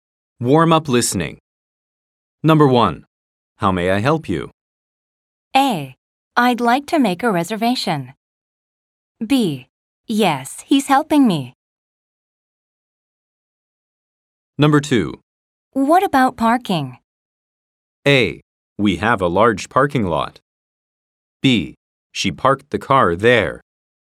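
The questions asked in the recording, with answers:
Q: How may I help you?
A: A: I'd like to make a reservation.

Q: What about parking?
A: A: We have a large parking lot.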